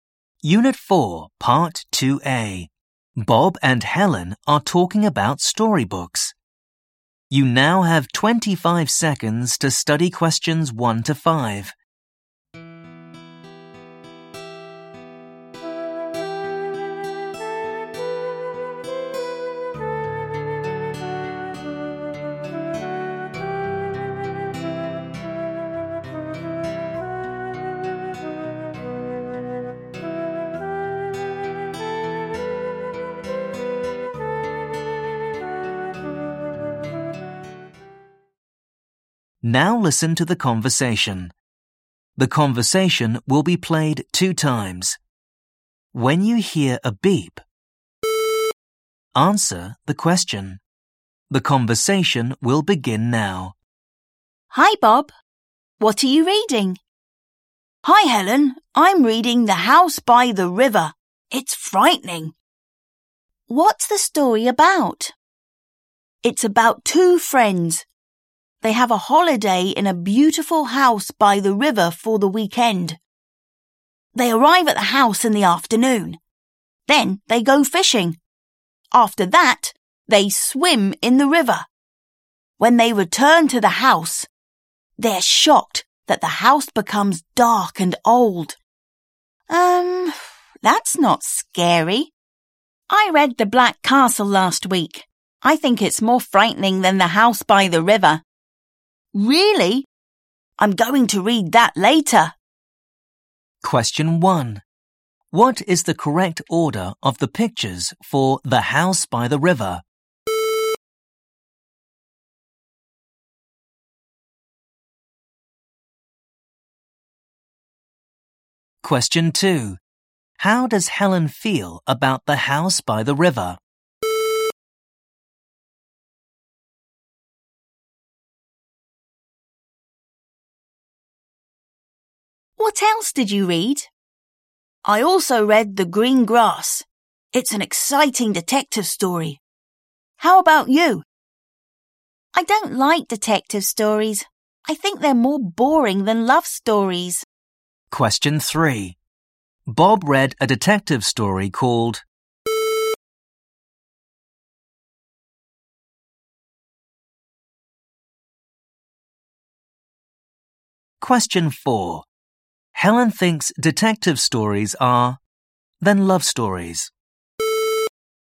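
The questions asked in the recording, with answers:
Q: How does Helen feel about The House by the River?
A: She thinks it's not scary

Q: Bob read a detective story called...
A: The Green Grass

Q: Helen thinks detective stories are than love stories.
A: more boring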